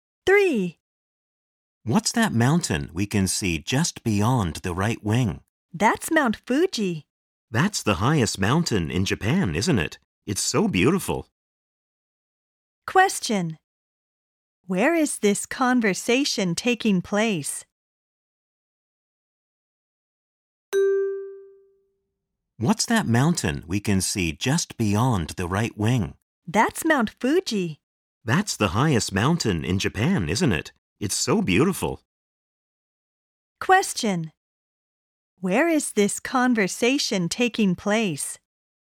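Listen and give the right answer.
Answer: On an airplane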